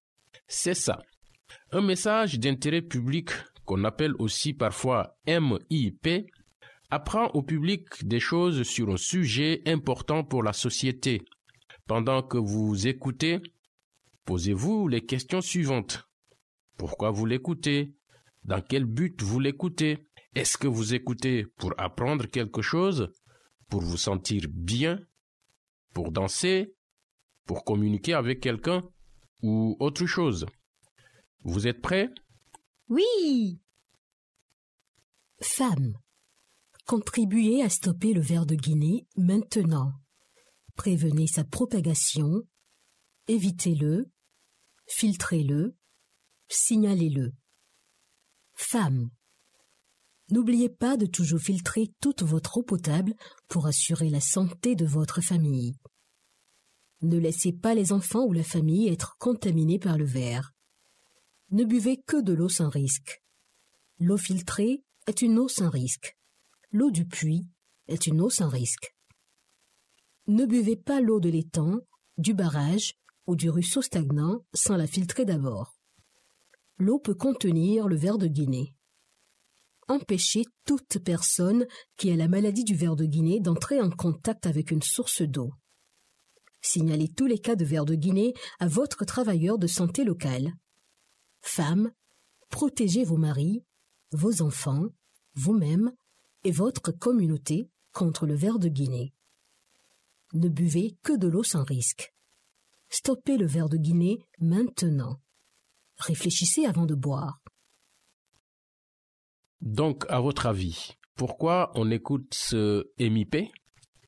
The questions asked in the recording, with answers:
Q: Donc, à votre avis, pourquoi on écoute ce MIP?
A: On écoute ce MIP pour apprendre comment éviter la maladie du ver de Guinée.